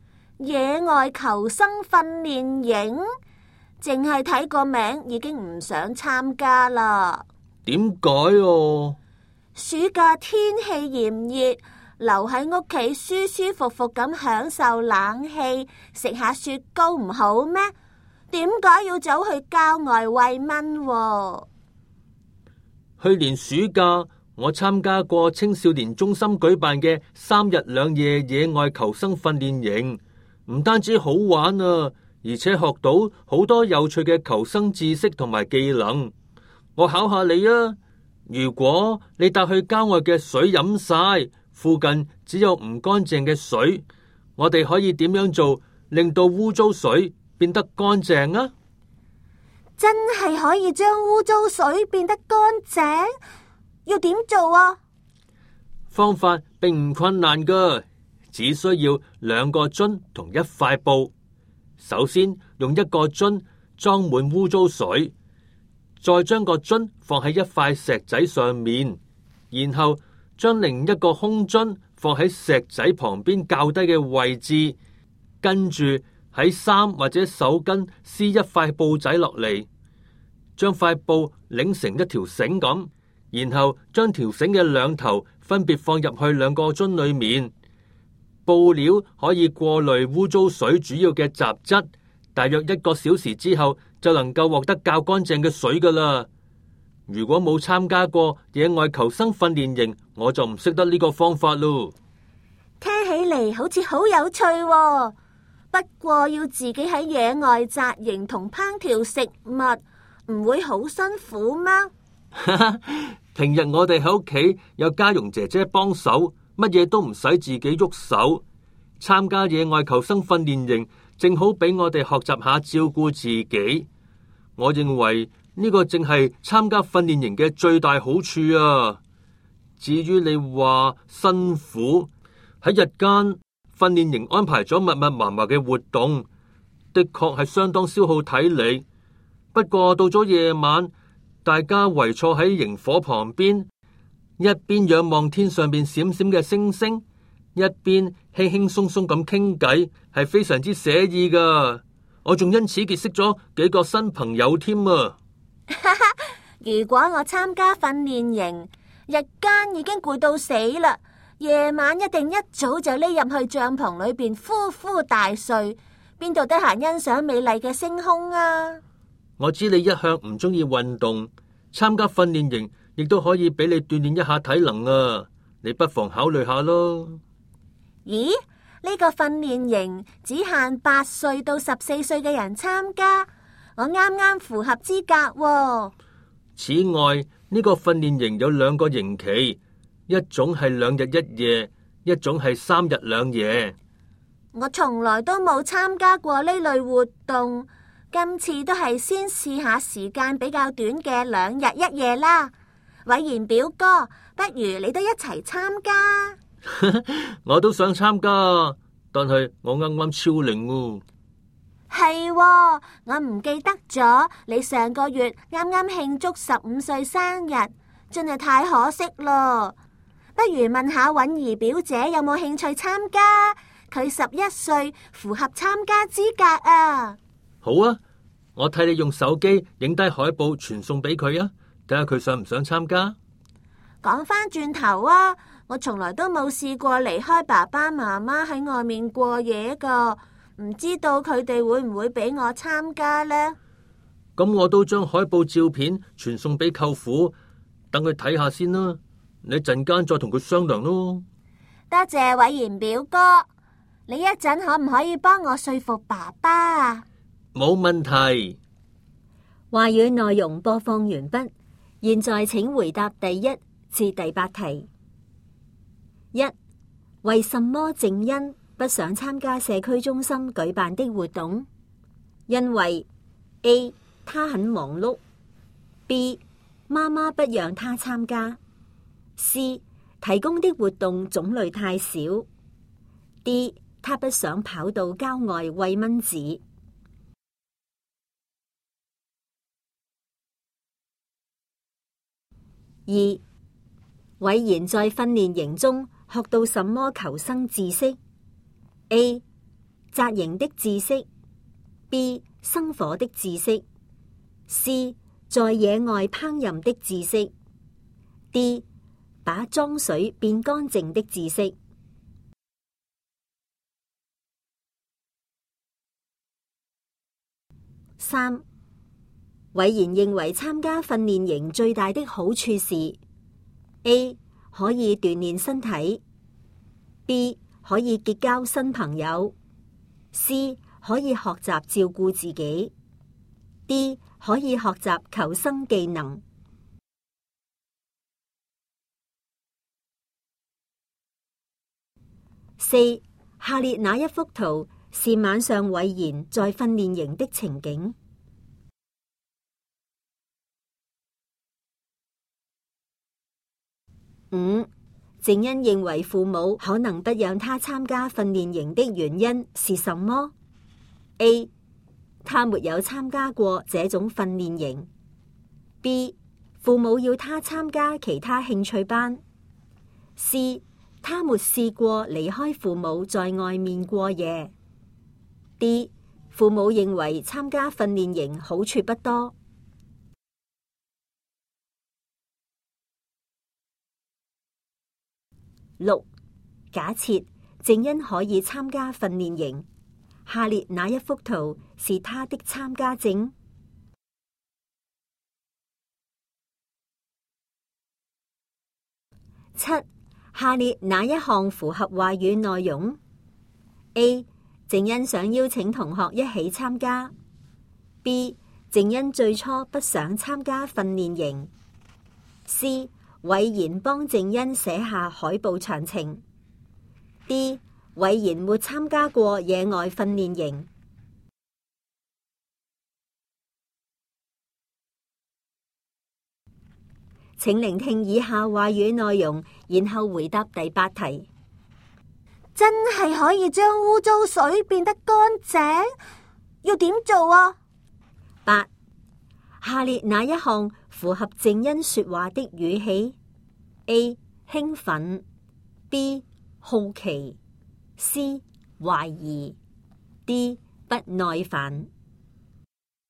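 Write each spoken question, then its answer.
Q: 伟贤在训练营中学到什么求生知识?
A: D: 把脏水变干净的知识

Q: 伟贤认为参加训练营最大的好处是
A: C: 可以学习照顾自己

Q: 静恩认为父母可能不让他参加训练营的原因是什么?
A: C: 他没试过离开父母在外面过夜

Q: 下列哪一项符合话语内容?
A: B: 静恩最初不想参加训练营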